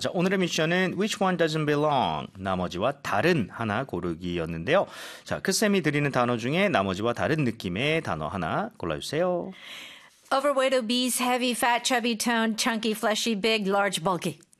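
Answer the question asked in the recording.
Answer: toned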